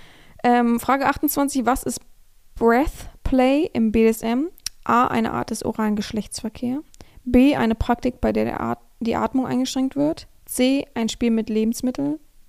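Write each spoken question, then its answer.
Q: Was ist Breath Play im BDSM?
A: B: Eine Praktik, bei der die Atmung eingeschränkt wird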